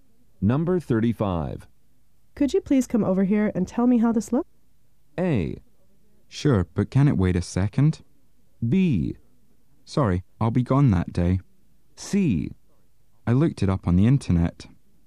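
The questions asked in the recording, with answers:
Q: Could you please come over here and tell me how this looks?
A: A: Sure, but can it wait a second?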